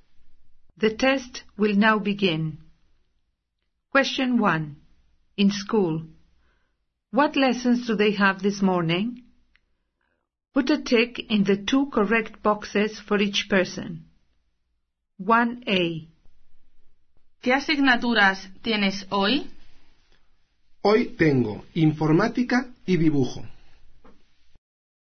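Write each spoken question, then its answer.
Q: In school, what lessons do they have this morning?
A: ICT and art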